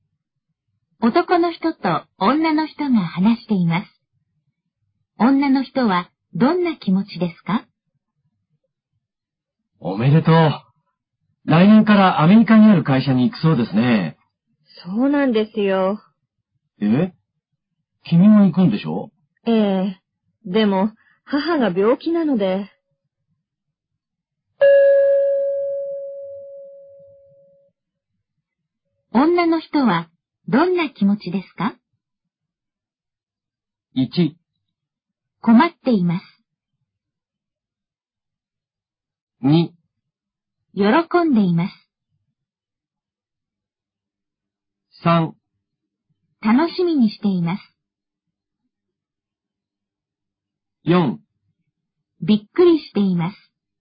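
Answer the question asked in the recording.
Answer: 1: 困っています。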